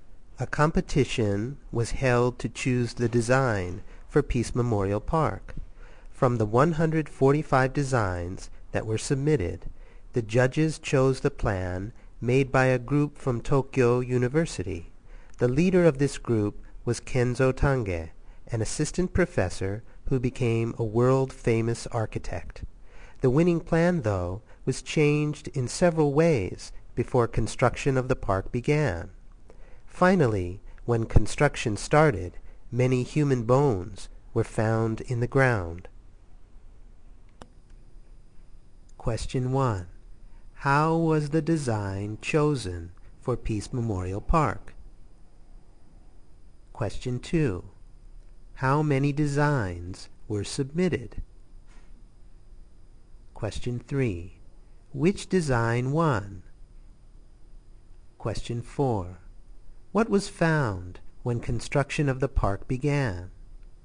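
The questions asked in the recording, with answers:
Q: How was the design chosen for Peace Memorial Park?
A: Through a competition

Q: How many designs were submitted?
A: 145

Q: Which design won?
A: The plan made by a group from Tokyo University, led by Kenzo Tange

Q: What was found when construction of the park began?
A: Many human bones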